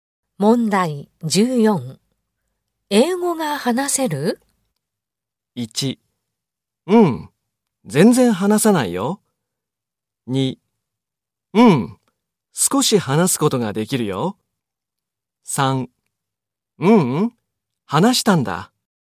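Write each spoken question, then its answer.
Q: 英語が話せる?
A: 1: うん、少し話すことができるよ。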